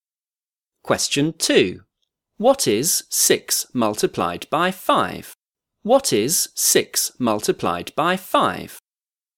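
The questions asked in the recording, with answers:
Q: What is 6 multiplied by 5?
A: 30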